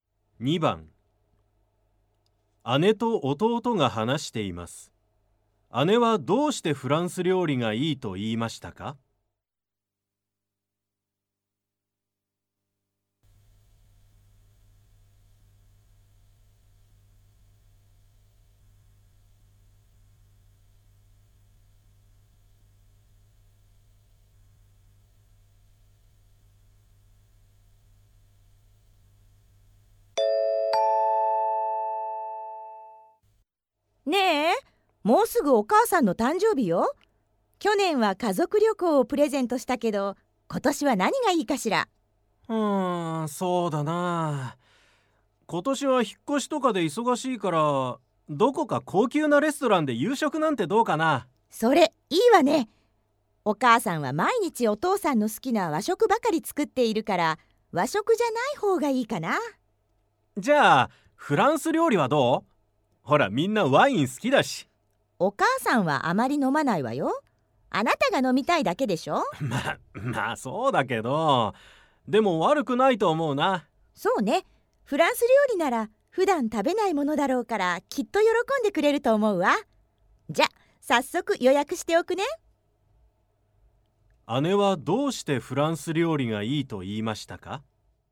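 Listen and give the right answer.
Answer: お母さんが普段食べないものだから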